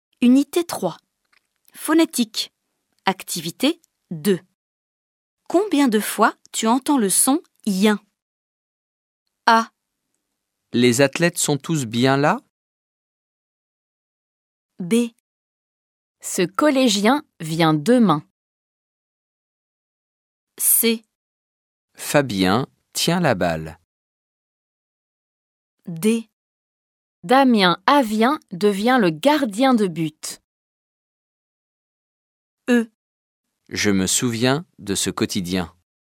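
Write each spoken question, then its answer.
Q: Les athlètes sont tous bien là?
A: 1 fois

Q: Ce collégien vient demain.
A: 2 fois

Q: Fabien tient la balle.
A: 2 fois

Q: Je me souviens de ce quotidien.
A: 2 fois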